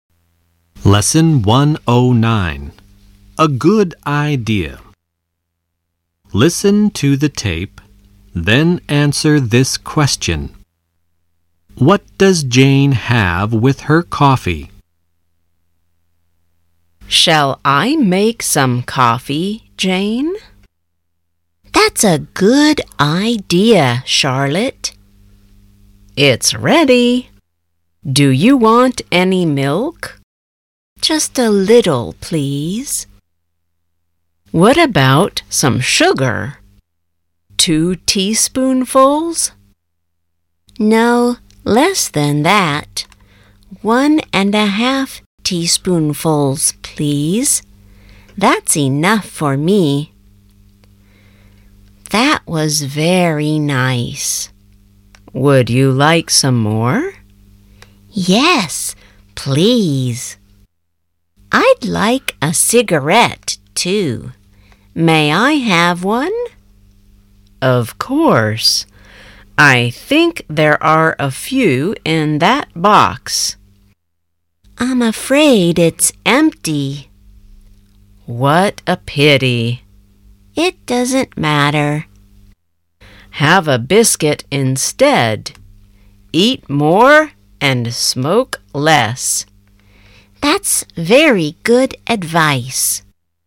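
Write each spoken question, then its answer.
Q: What does Jane have with her coffee?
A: A little milk and one and a half teaspoonfuls of sugar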